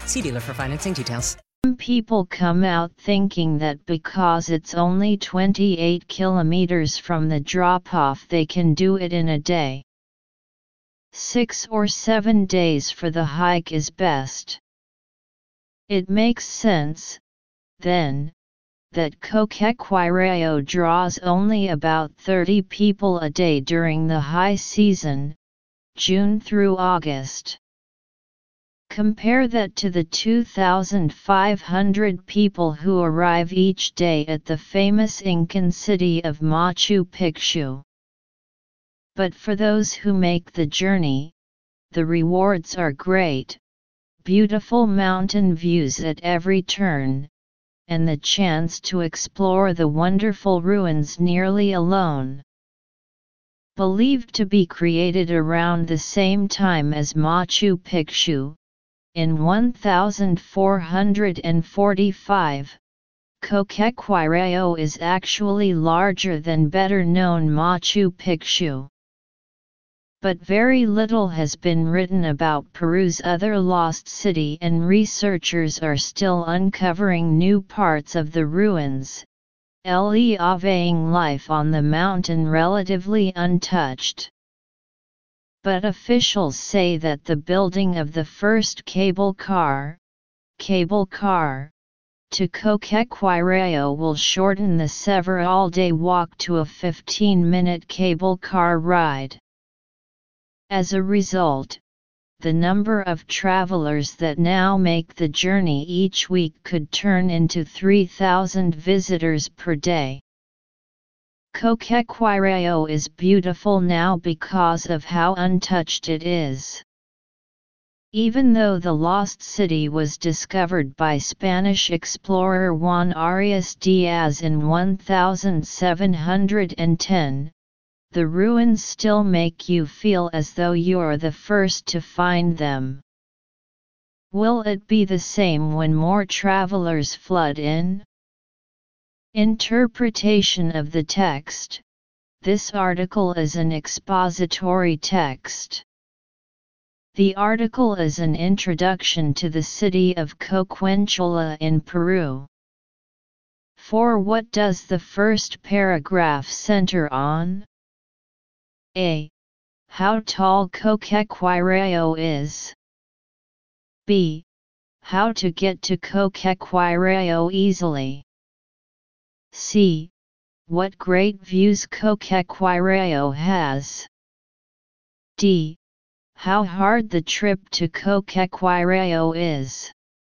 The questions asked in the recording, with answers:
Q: For what does the first paragraph center on?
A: Choose the general idea of paragraph D.